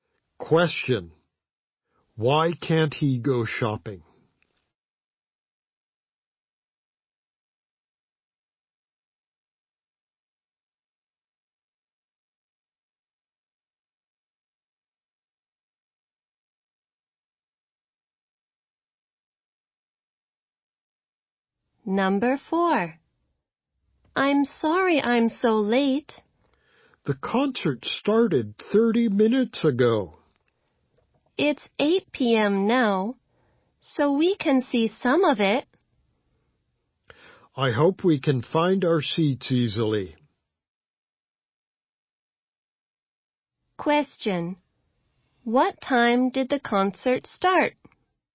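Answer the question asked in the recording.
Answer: 7:30 p.m.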